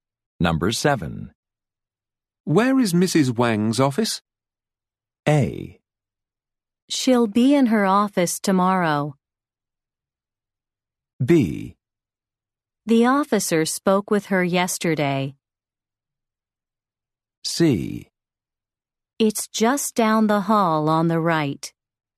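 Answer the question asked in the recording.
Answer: C: It's just down the hall on the right.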